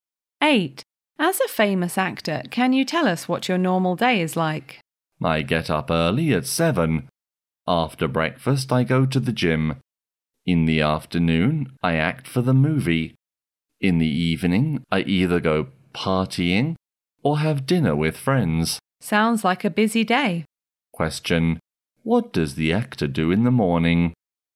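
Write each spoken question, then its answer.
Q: What does the actor do in the morning?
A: He goes to the gym after breakfast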